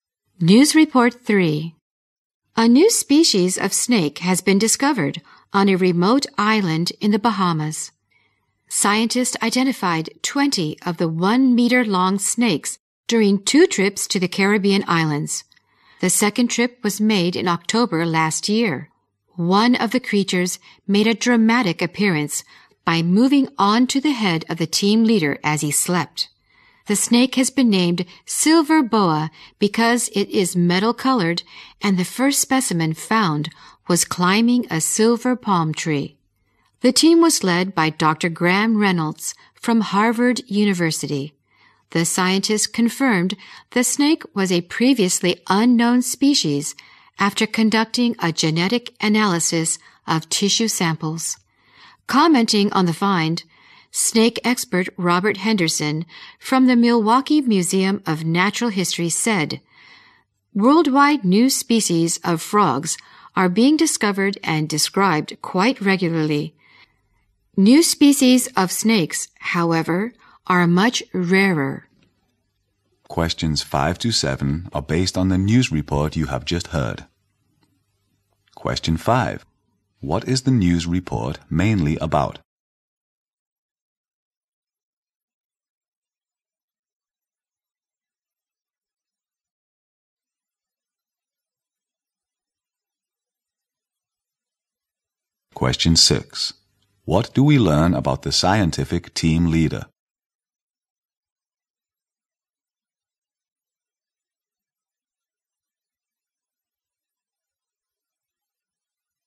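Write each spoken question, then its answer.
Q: What is the news report mainly about?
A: The discovery of a new species of snake in the Bahamas

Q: What do we learn about the scientific team leader?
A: A snake moved onto his head while he slept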